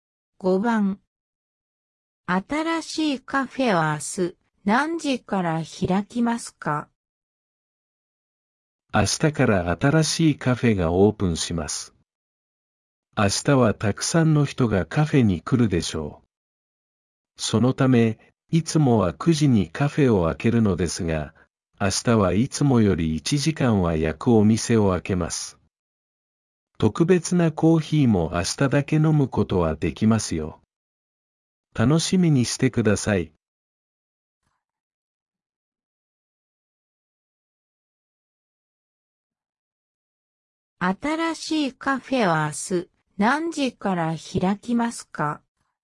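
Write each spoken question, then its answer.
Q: 新しいカフェは明日何時から開きますか?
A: 8時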